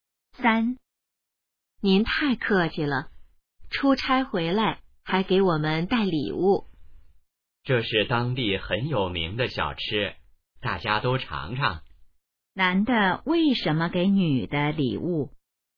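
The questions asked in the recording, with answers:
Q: 男的为什么给女的礼物?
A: 他出差回来,给大家带了当地有名的小吃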